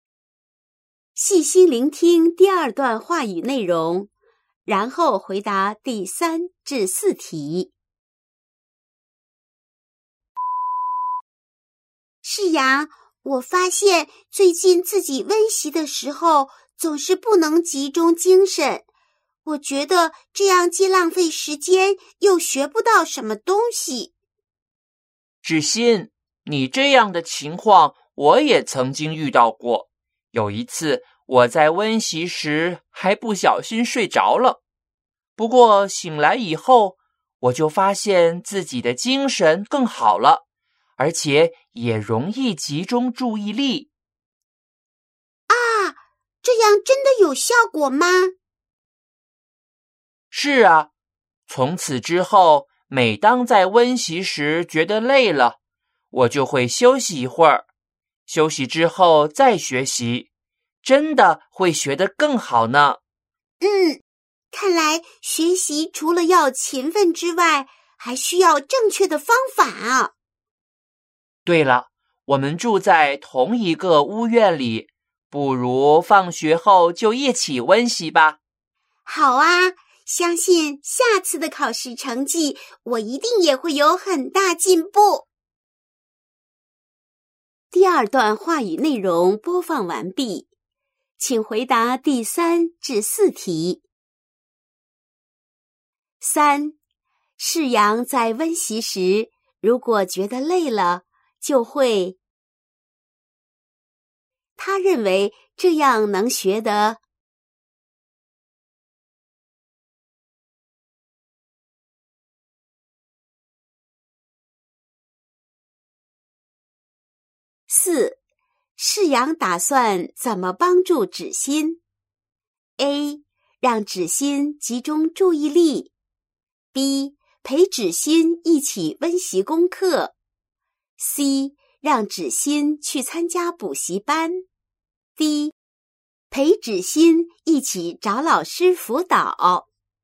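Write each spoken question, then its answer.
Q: 三,释阳在温习时,如果觉得累了,就会,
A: 休息一会儿

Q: 他认为这样能学得。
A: 更好

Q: 四,释阳打算怎么帮助芷馨? A. 让芷馨集中注意力, B. 陪芷馨一起温习功课, C. 让芷馨去参加补习班, D. 陪芷馨一起找老师辅导。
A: B: 陪芷馨一起温习功课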